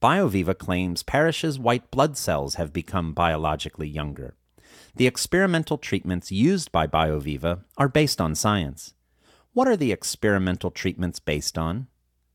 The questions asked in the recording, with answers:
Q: What are the experimental treatments based on?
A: The experimental treatments are based on science.